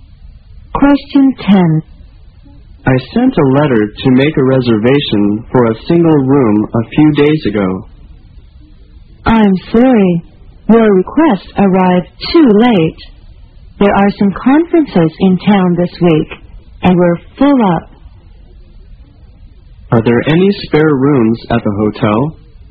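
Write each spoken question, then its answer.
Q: Are there any spare rooms at the hotel?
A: No, the hotel is full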